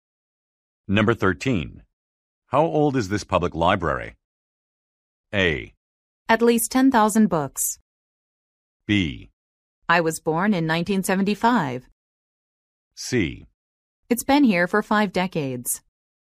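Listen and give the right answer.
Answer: C: It's been here for 5 decades.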